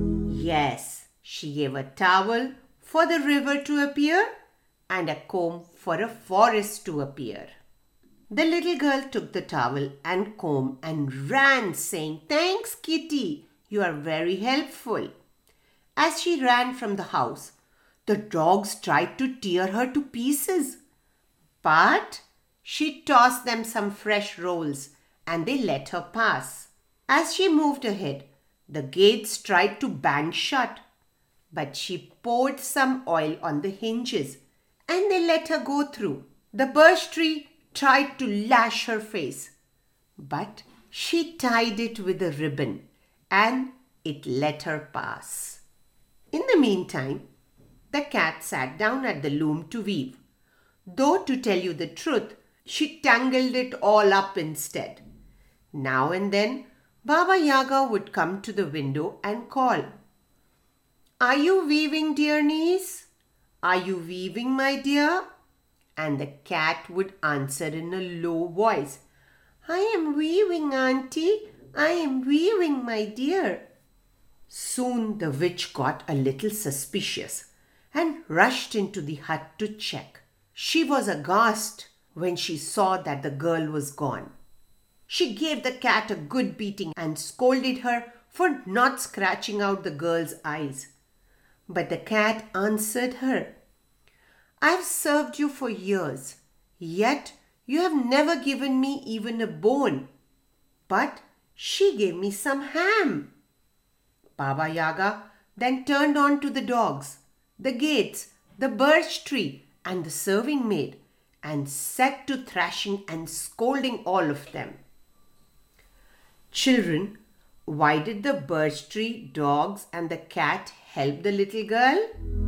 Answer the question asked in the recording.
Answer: Right, because she was kind and gave them something nice.